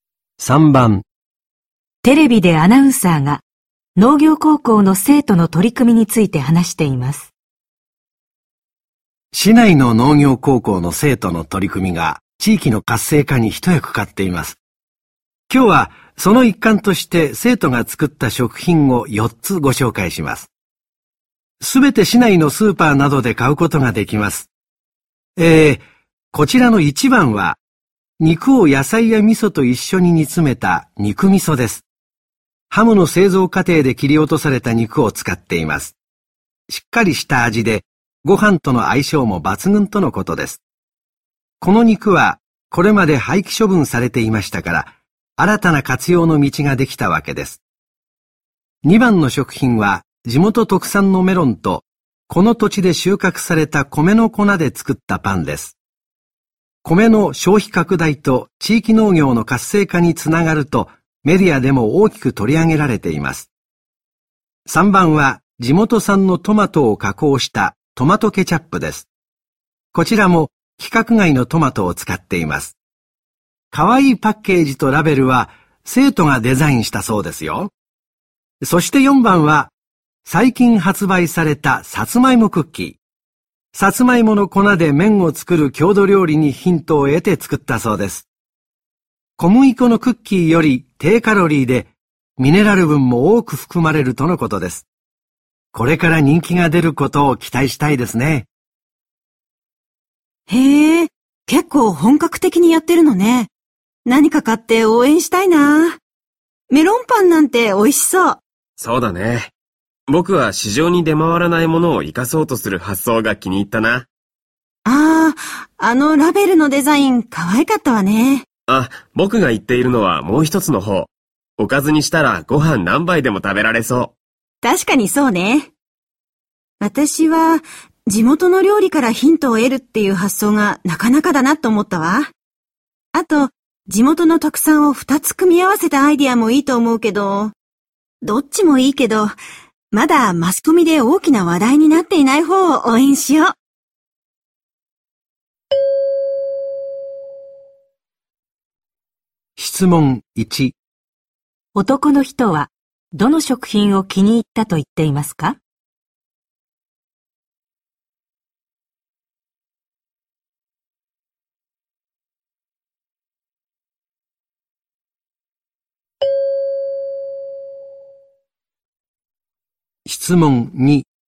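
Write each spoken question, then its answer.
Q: 男の人はどの食品を気に入ったと言っていますか?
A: 1番の肉味噌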